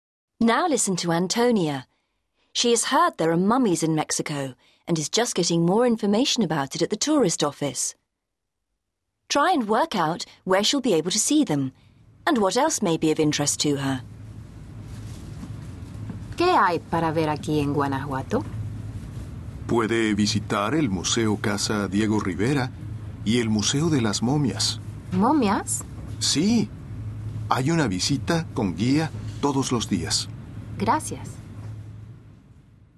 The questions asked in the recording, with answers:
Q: Try and work out where she'll be able to see them and what else may be of interest to her.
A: So, Antonia can go on a guided tour of the Mummy Museum.